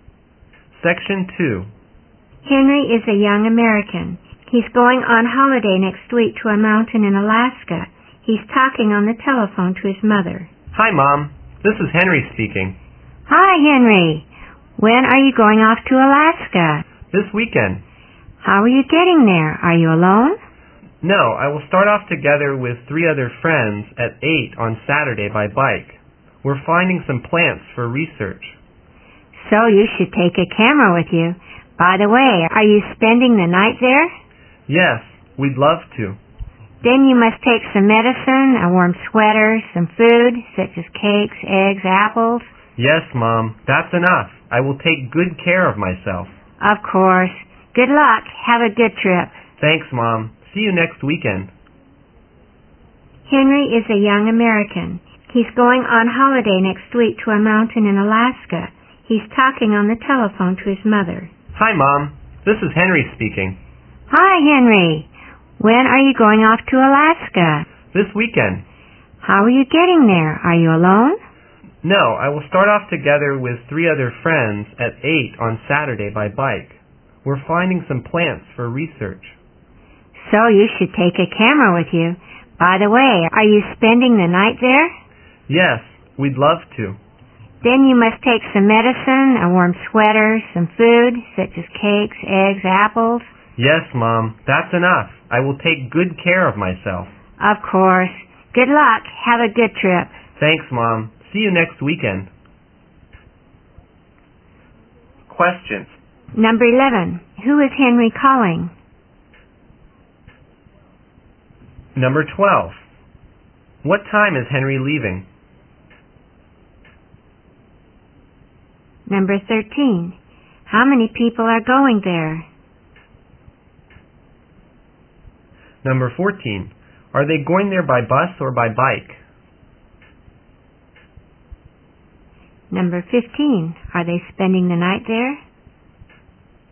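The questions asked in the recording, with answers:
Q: Who is Henry calling?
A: His mother

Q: What time is Henry leaving?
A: At 8 on Saturday

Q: How many people are going there?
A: Four

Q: Are they going there by bus or by bike?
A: By bike

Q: Are they spending the night there?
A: Yes, they are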